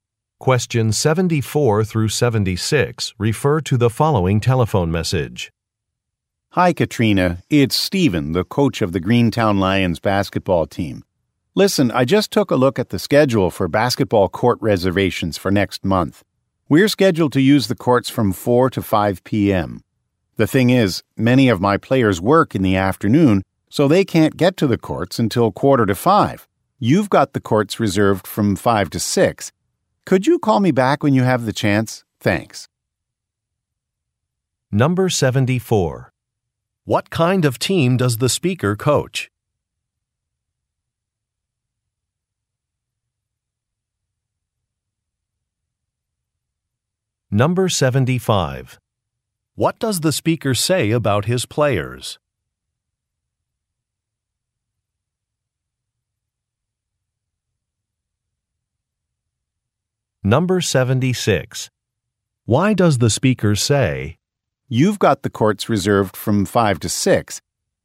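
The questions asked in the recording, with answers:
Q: What kind of team does the speaker coach?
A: A basketball team

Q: What does the speaker say about his players?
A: Many of them work in the afternoon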